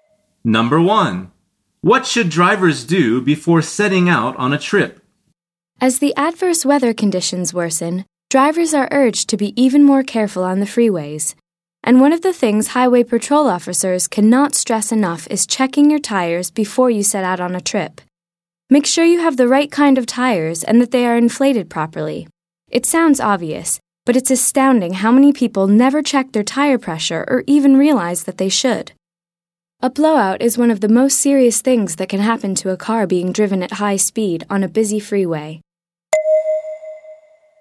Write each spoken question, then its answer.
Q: What should drivers do before setting out on a trip?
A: The answer is check their tires.